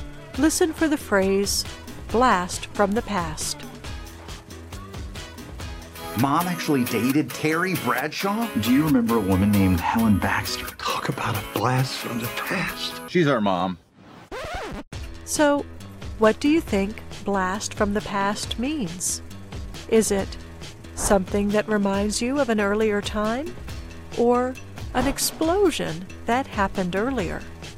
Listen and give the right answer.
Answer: Blast from the past usually means something that reminds you of an earlier time.